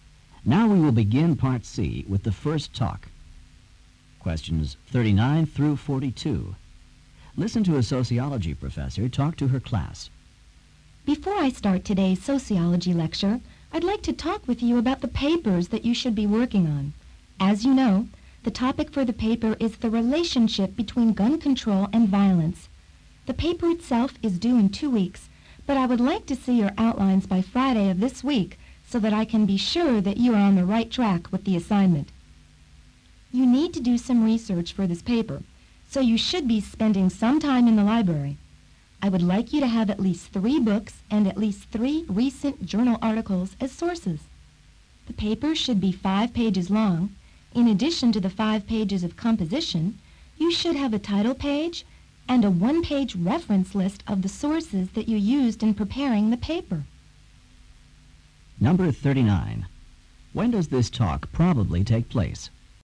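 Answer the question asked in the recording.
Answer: Before the sociology lecture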